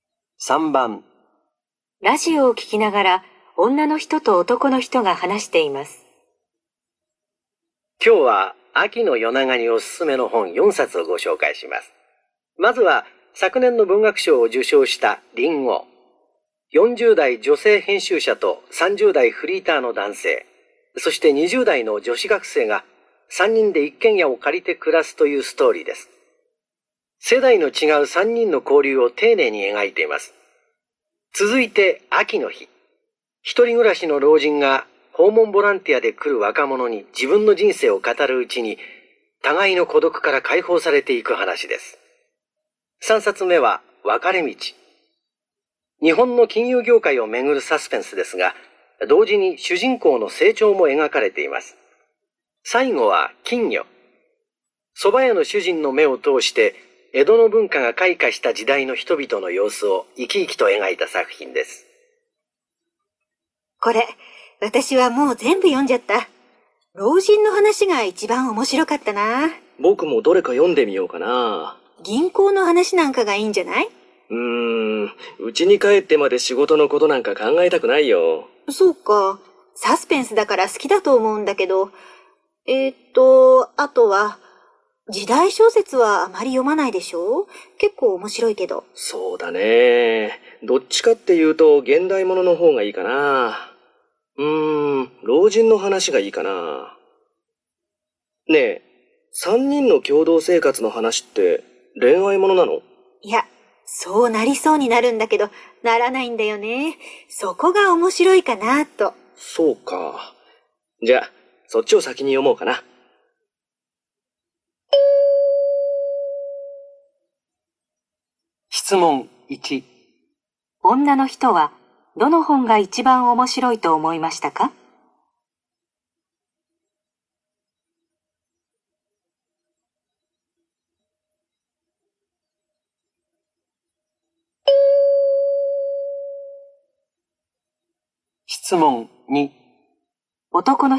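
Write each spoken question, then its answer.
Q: 女の人はどの本が一番面白いと思いましたか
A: 秋の日(老人の話)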